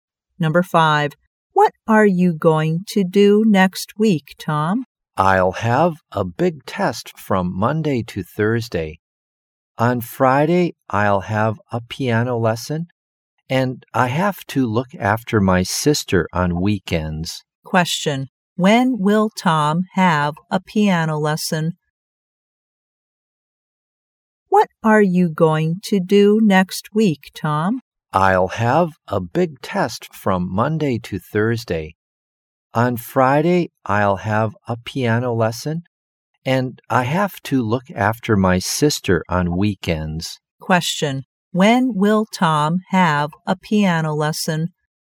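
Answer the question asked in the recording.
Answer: On Friday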